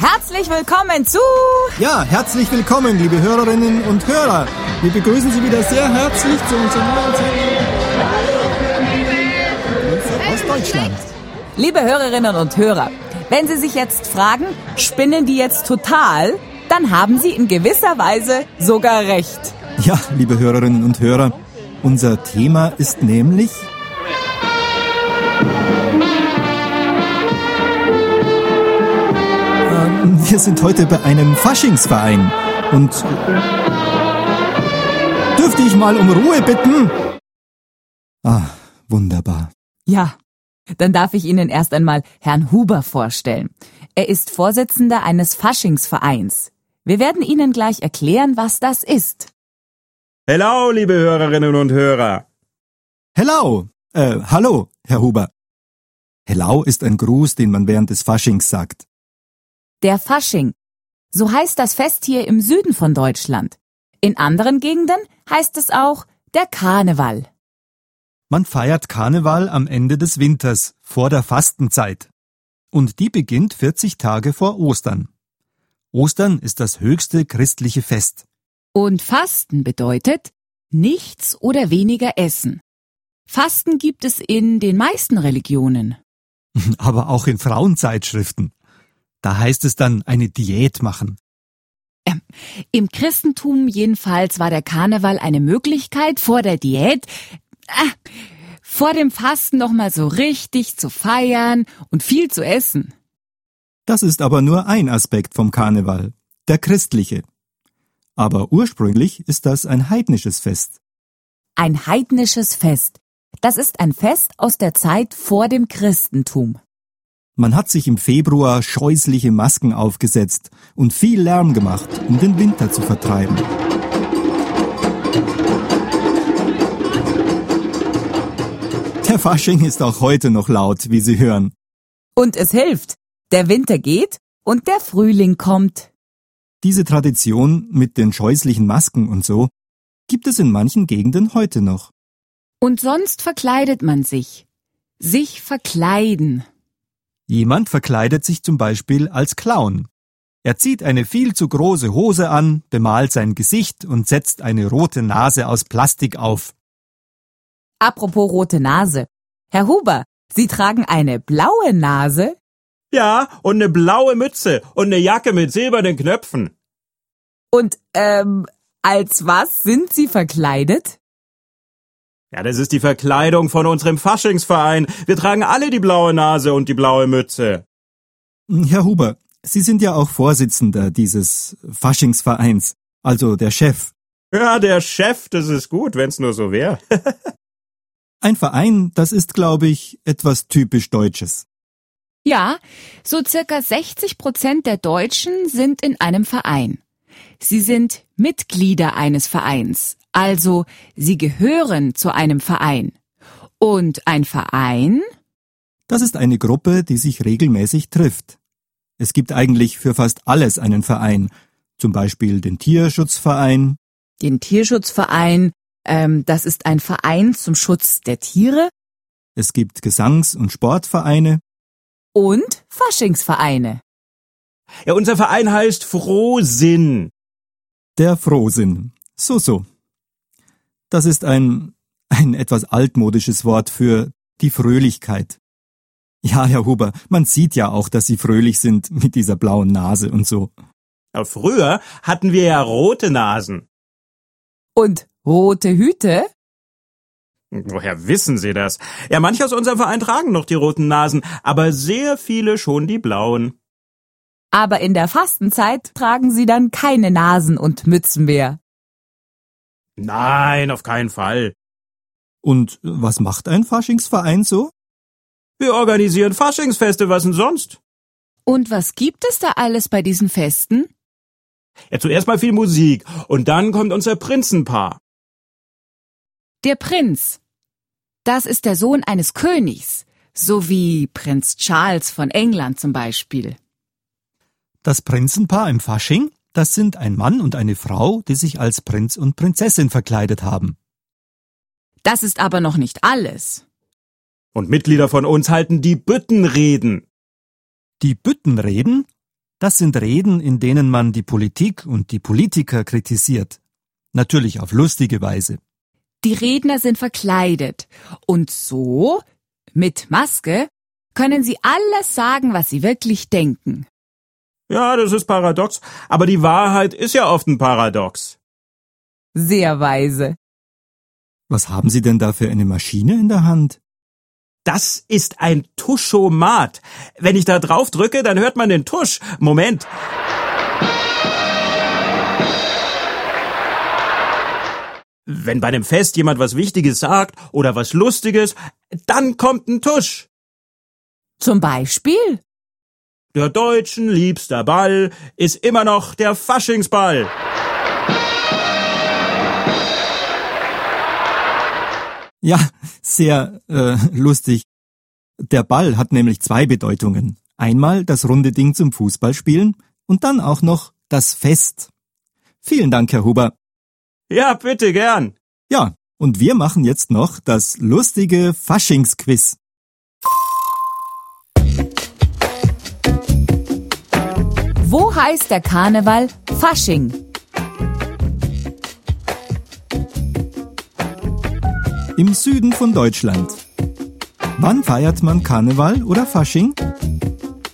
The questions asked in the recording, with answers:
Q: Wann feiert man Karneval oder Fasching?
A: Im Februar oder am Ende des Winters, vor der Fastenzeit.